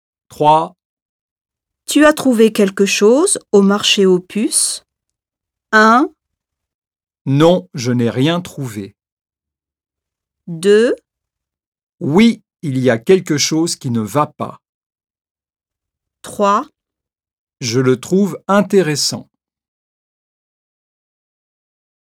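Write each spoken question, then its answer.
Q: Tu as trouvé quelque chose au marché aux puces?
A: 1: Non, je n'ai rien trouvé.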